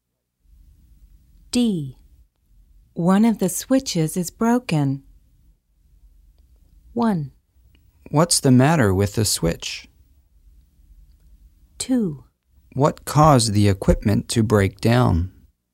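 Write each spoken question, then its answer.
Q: One of the switches is broken.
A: 2: What caused the equipment to break down?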